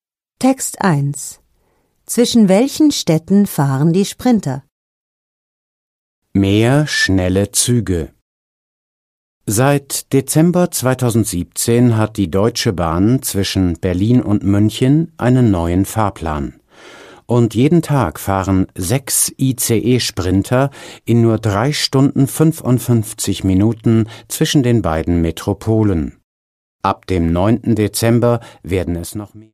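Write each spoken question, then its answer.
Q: Zwischen welchen Städten fahren die Sprinter?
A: Zwischen Berlin und München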